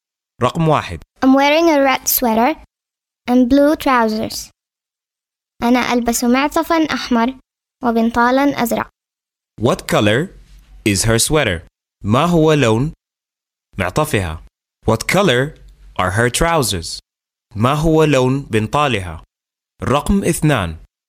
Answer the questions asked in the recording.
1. Red.
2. Blue.